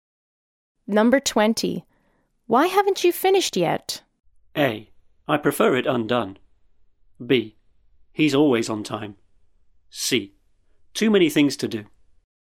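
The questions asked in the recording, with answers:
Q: Why haven't you finished yet?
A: C: Too many things to do.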